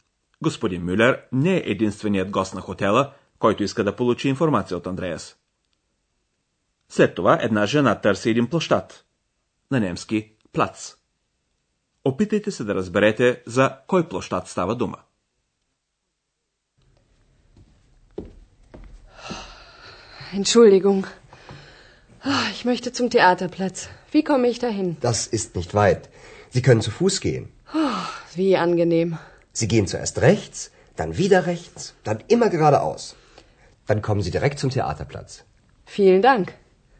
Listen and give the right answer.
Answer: Жената иска да отиде до площада пред театъра, на немски Театърплац.